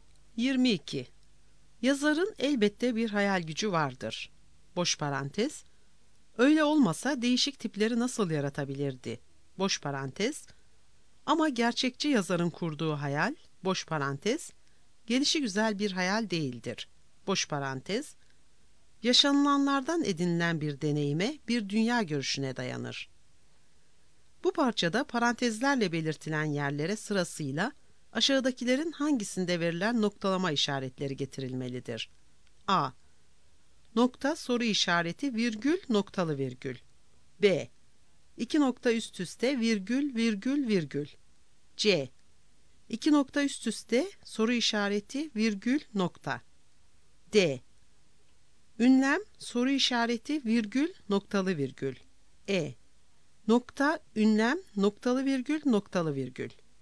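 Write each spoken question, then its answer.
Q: Bu parçada parantezlerle belirtilen yerlere sırasıyla aşağıdakilerin hangisinde verilen noktalama işaretleri getirilmelidir?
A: A: Nokta soru işareti virgül noktalı virgül.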